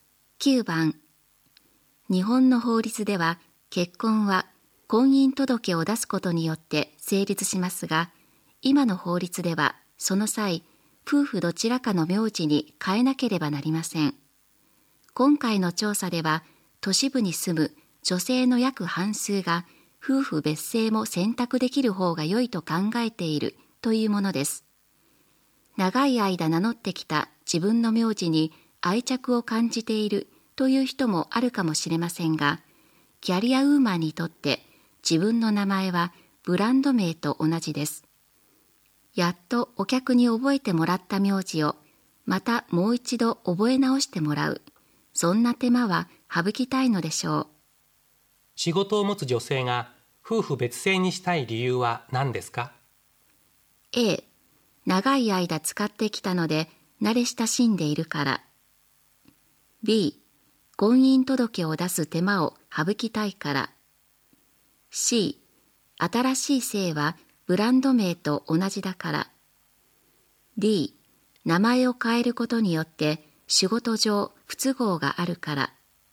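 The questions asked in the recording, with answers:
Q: 仕事を持つ女性が夫婦別姓にしたい理由は何ですか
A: D: 名前を変えることによって仕事上不都合があるから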